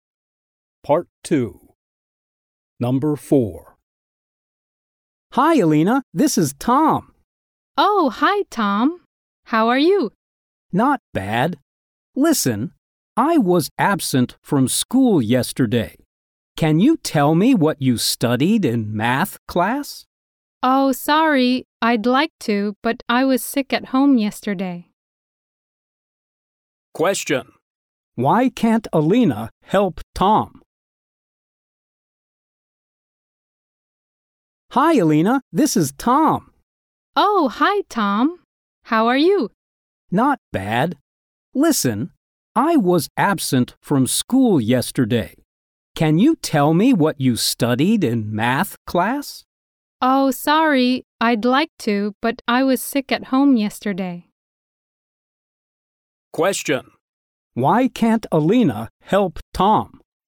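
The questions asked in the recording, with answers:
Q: Why can't Alina help Tom?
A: She was absent (sick at home) yesterday.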